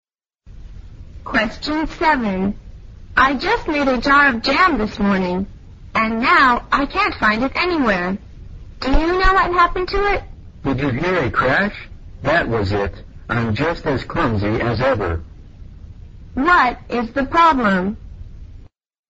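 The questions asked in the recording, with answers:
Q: What is the problem?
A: The jar of jam was broken; someone dropped it.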